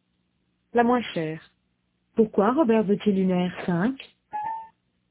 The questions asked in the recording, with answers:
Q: Pourquoi Robert veut-il une R5?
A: Parce qu'il paraît que ce sont les moins chers.